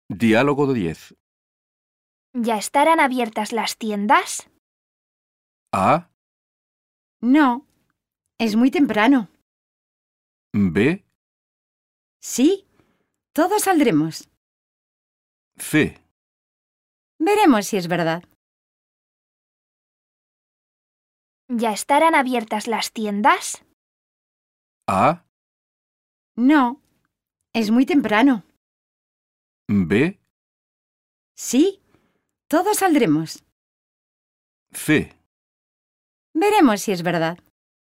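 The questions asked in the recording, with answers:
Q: ¿Ya estarán abiertas las tiendas?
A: A: No, es muy temprano.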